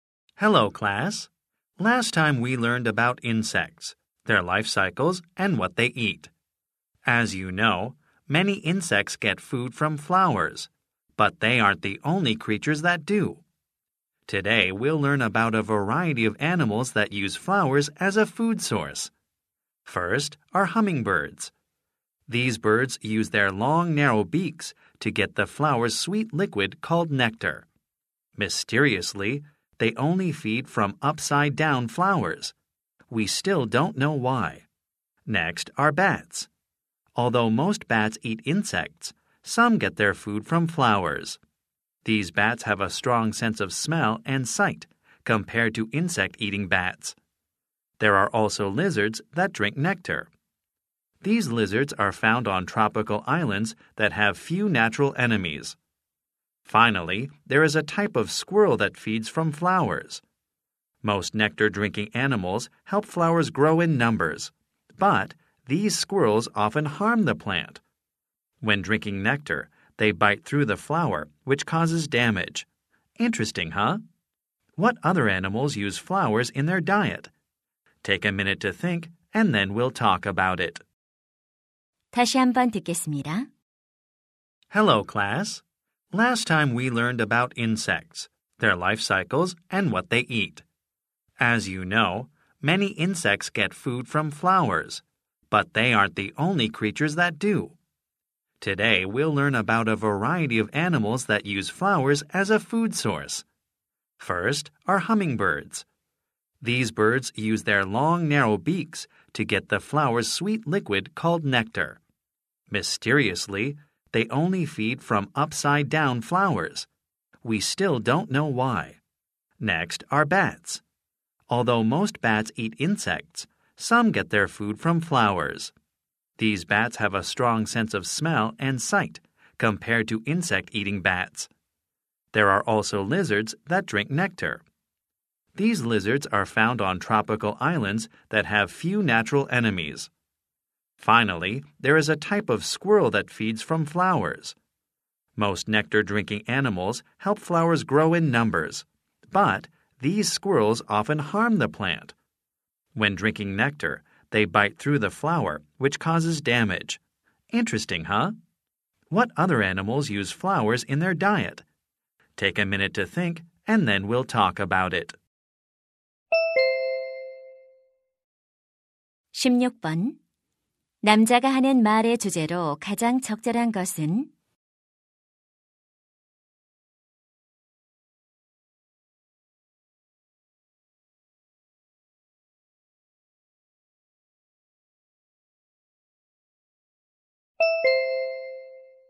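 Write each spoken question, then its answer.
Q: 남자가 하는 말의 주제로 가장 적절한 것은?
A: 꽃을 먹이로 이용하는 다양한 동물들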